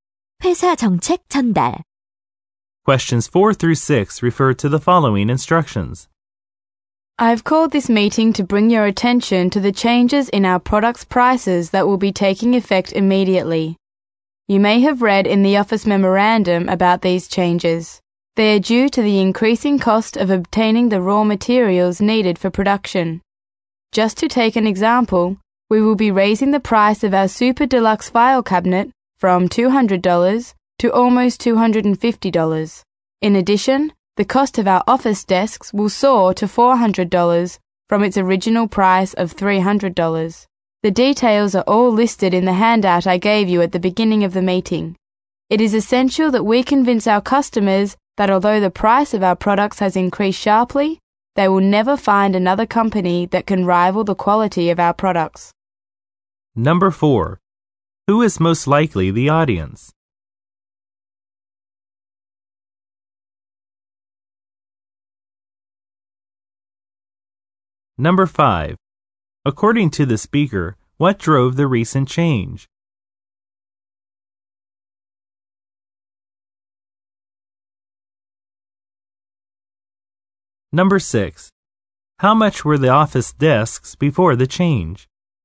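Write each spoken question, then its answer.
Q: According to the speaker, what drove the recent change?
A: The increasing cost of raw materials

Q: How much were the office desks before the change?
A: $300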